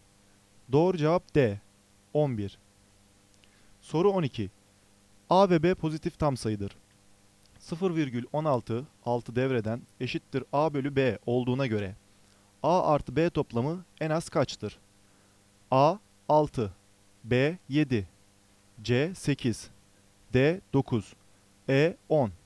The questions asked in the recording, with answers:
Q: 0,16, 6 devreden eşittir A bölü B olduğuna göre A artı B toplamı en az kaçtır?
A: Doğru cevap B, 7.